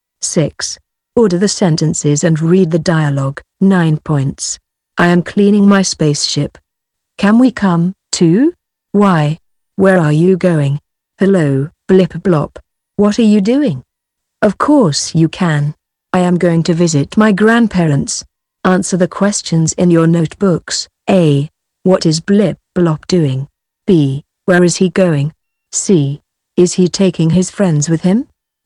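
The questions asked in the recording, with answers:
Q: What is Blip Blop doing?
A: He is cleaning his spaceship.

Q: Where is he going?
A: To visit his grandparents.

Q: Is he taking his friends with him?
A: Yes, he is.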